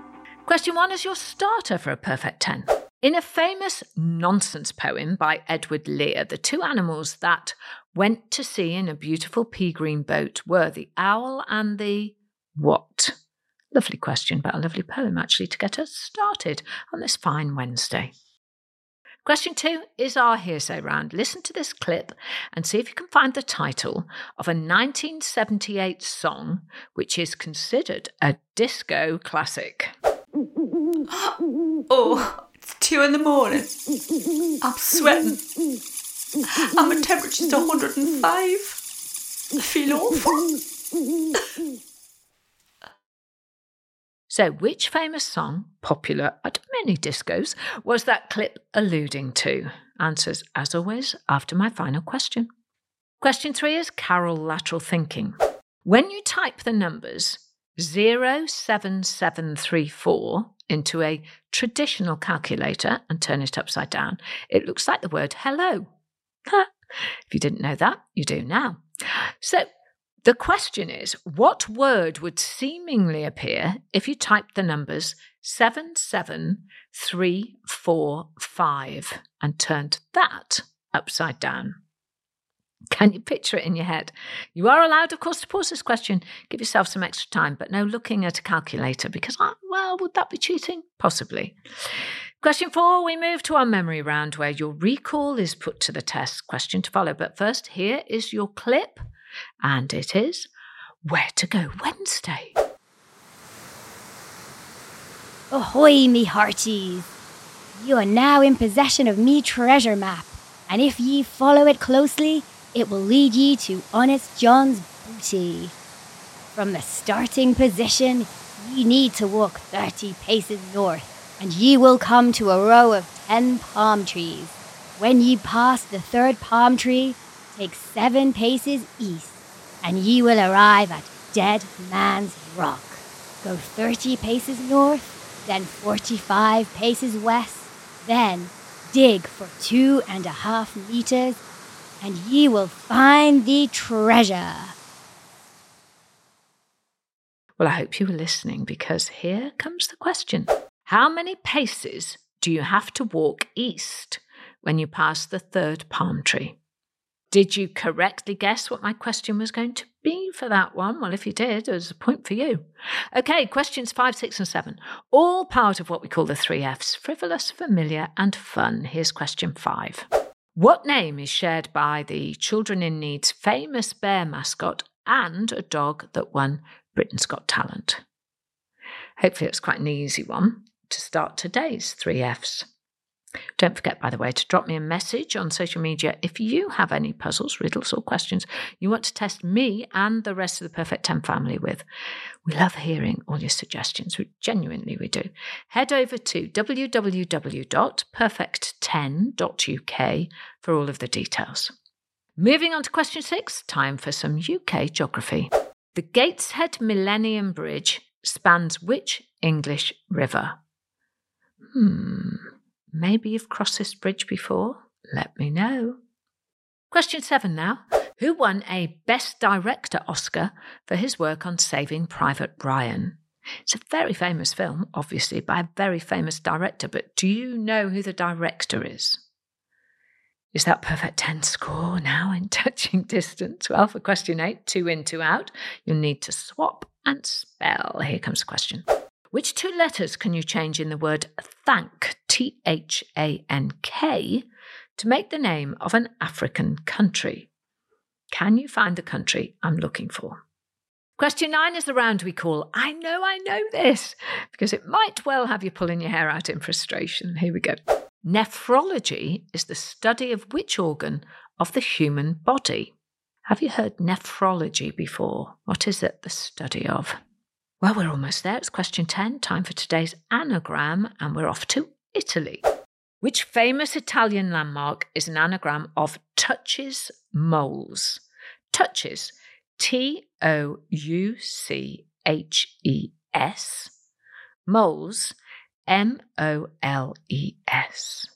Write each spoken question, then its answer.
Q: How many paces do you have to walk east when you pass the third palm tree?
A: The answer is 7 paces.